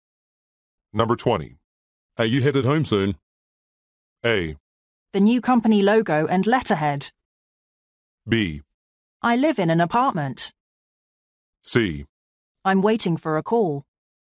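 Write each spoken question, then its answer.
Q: Are you headed home soon?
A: C: I'm waiting for a call.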